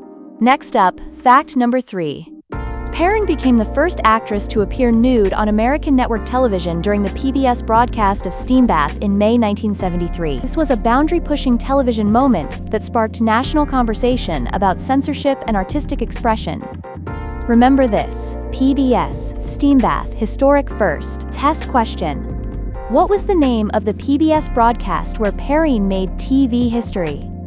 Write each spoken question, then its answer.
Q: What was the name of the PBS broadcast where Perrine made TV history?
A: Correct answer, Steam Bath.